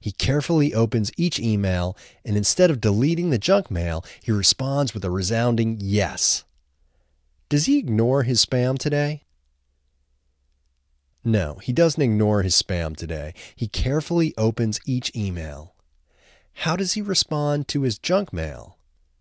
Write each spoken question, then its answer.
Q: How does he respond to his junk mail?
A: He responds with a resounding yes.